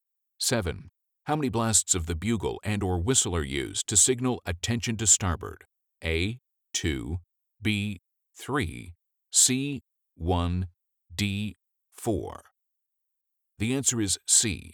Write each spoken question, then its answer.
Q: How many blasts of the bugle and or whistle are used to signal attention to starboard?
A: The answer is C. 1.